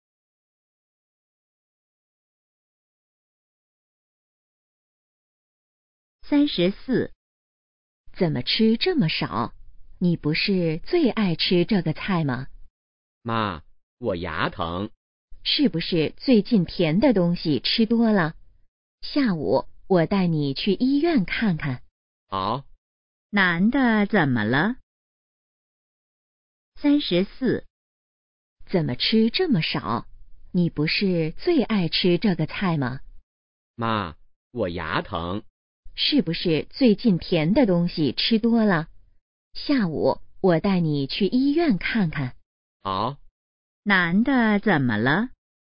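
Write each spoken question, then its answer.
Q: 男的怎么了?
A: 牙疼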